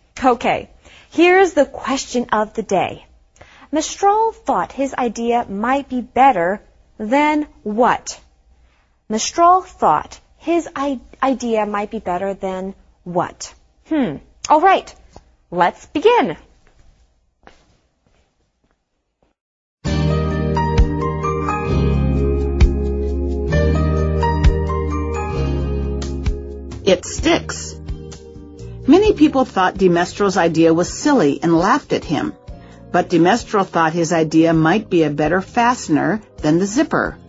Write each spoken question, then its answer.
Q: Mestral thought his idea might be better than what?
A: Well, he thought Velcro would be a better fastener than a zipper.